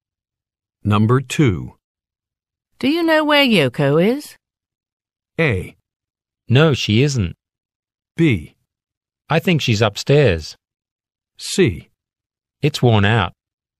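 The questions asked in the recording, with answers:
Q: Do you know where Yoko is?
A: B: I think she's upstairs.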